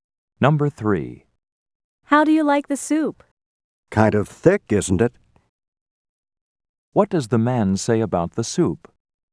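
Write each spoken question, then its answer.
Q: What does the man say about the soup?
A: It's too thick.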